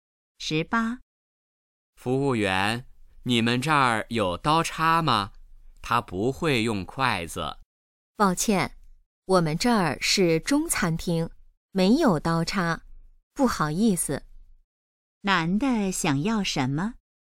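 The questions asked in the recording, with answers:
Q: 男的想要什么?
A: 刀叉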